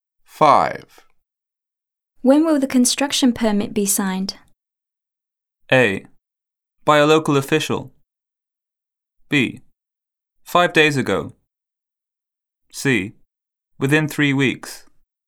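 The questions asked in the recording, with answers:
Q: When will the construction permit be signed?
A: C: Within 3 weeks.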